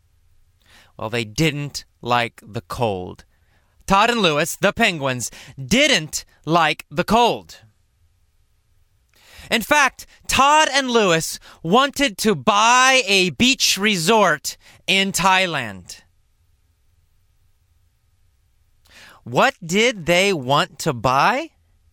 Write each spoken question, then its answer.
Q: What did they want to buy?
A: They wanted to buy a beach resort.